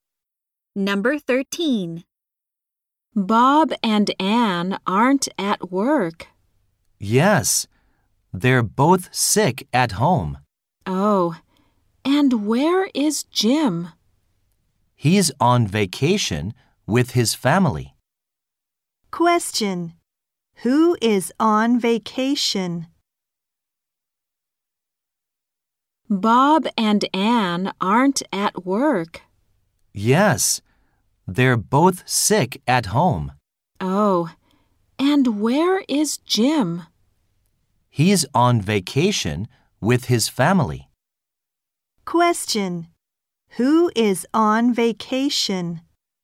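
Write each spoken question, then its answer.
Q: Who is on vacation?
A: Jim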